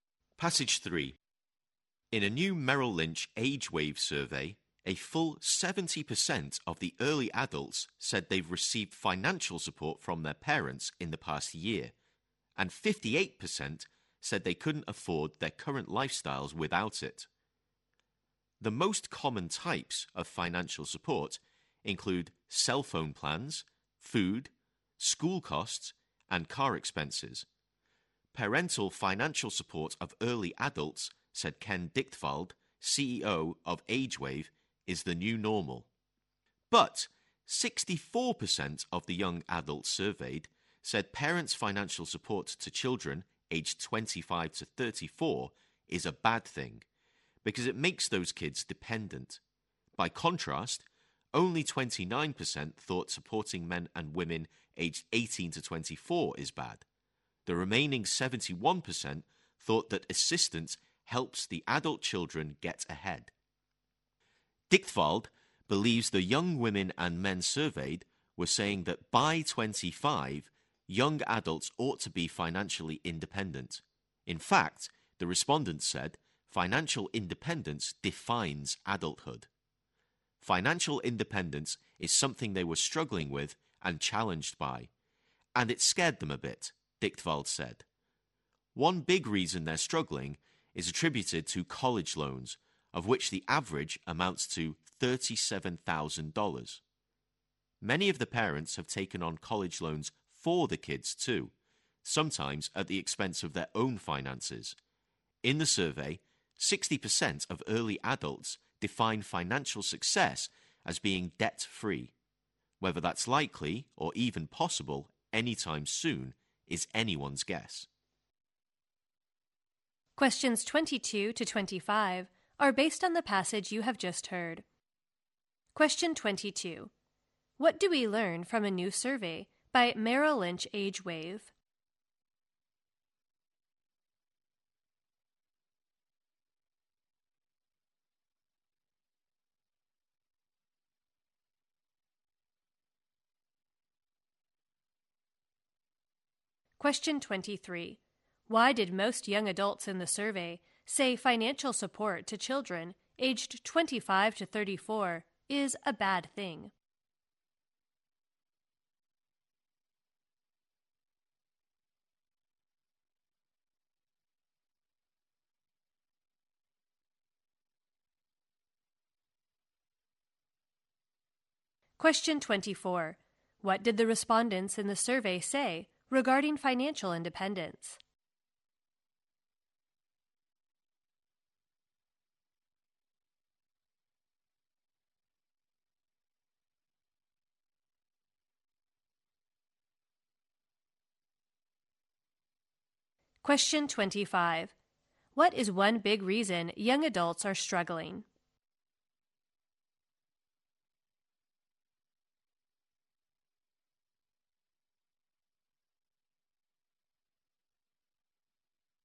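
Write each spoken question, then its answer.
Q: Why did most young adults in the survey say financial support to children aged 25 to 34 is a bad thing?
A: It makes them dependent

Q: What did the respondents in the survey say regarding financial independence?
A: It defines adulthood

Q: What is one big reason young adults are struggling?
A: College loans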